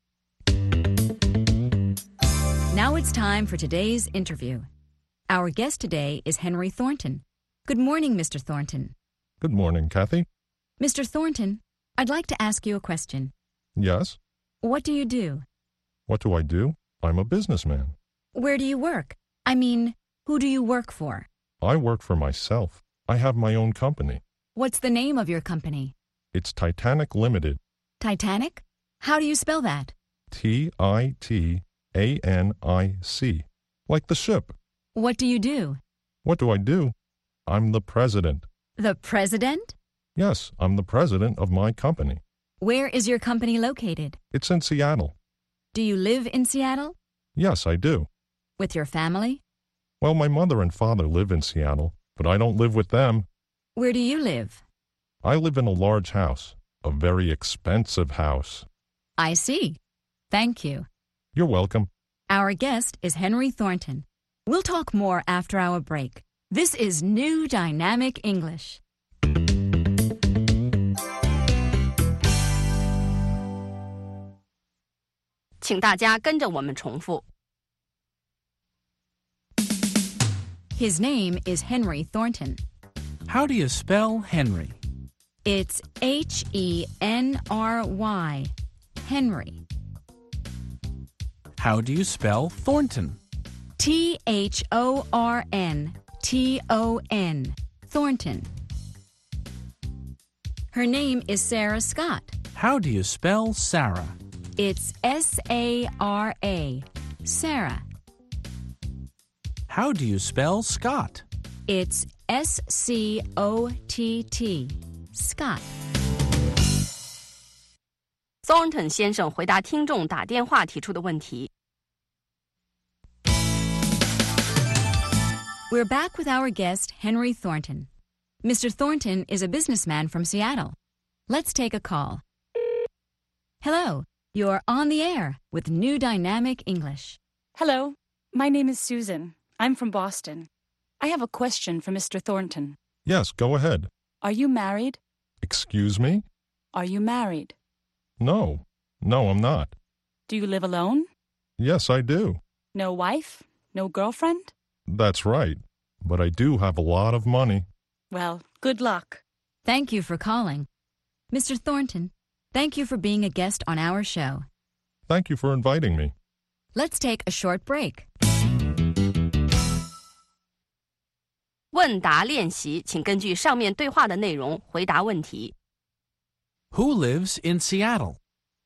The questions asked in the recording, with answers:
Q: Who lives in Seattle?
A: Henry Thornton lives in Seattle.